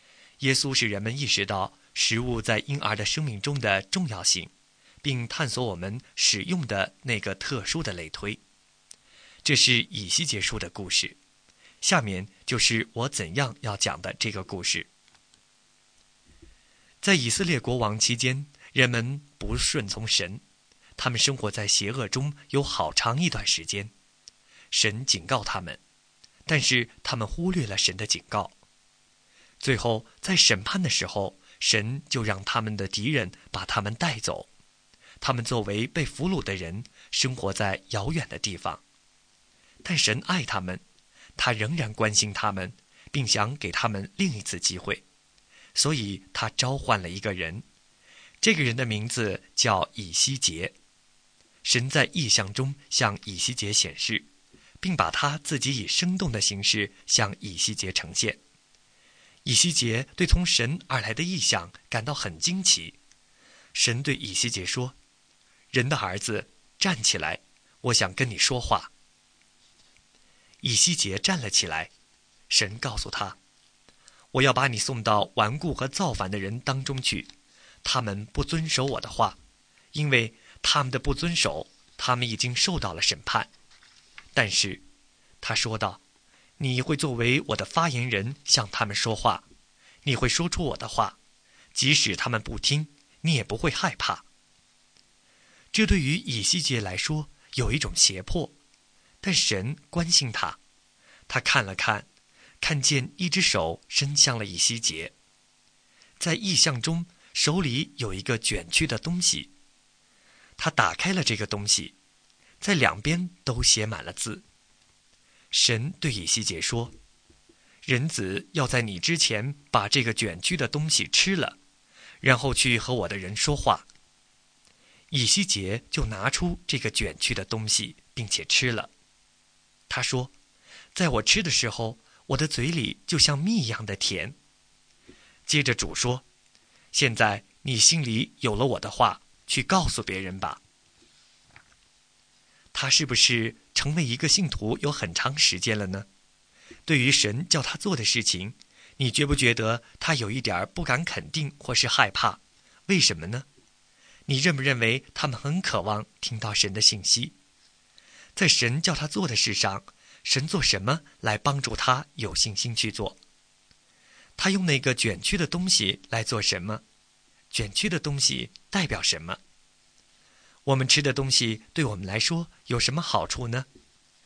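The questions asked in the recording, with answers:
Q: 他用那个卷曲的东西来做什么?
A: 把它吃了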